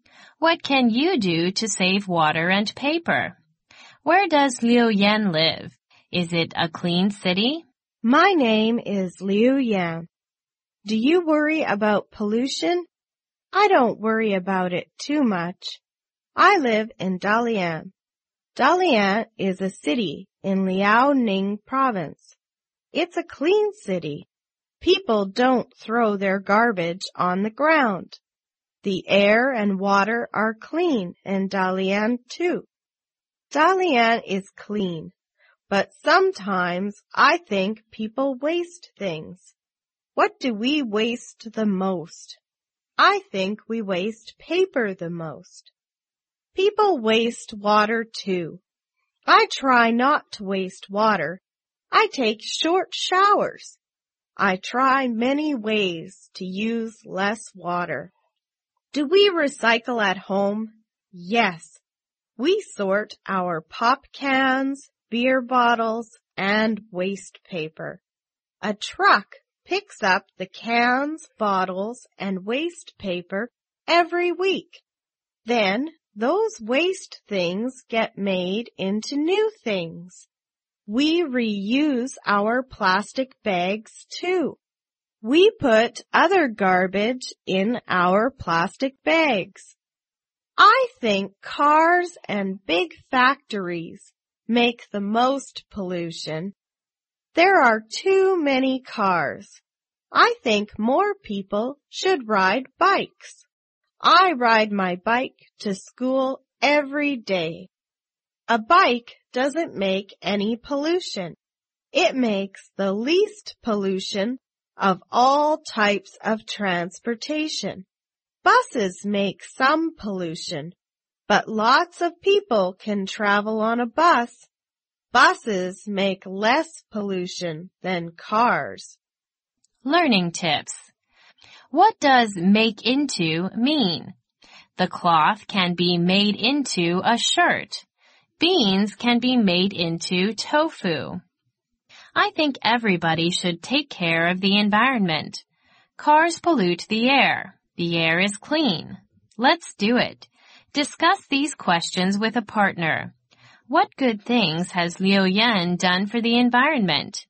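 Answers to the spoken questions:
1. In Dalian, Liaoning province
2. Yes, it's a clean city
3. Takes short showers, recycles, reuses plastic bags, rides a bike to school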